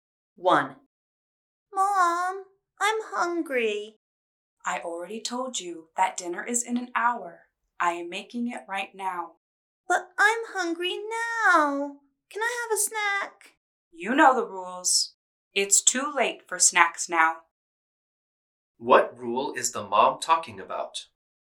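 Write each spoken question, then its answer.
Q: What rule is the mom talking about?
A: No snacks right before dinner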